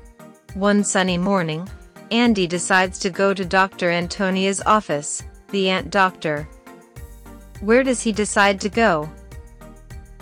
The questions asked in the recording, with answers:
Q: Where does he decide to go?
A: To a doctor's office. He decides to go to a doctor's office.